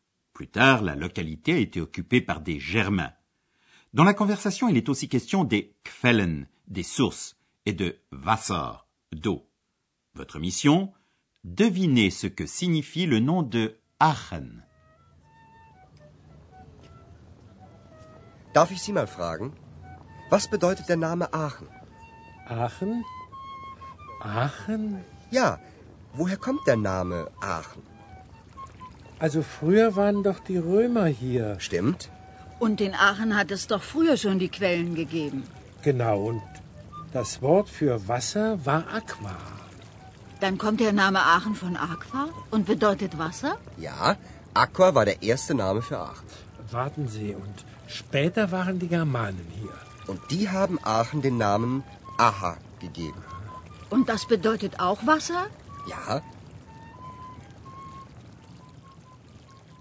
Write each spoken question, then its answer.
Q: Votre mission, devinez ce que signifie le nom de Aachen.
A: Il fallait trouver que Aachen signifie eau, parce que Aix-la-Chapelle possède beaucoup de sources.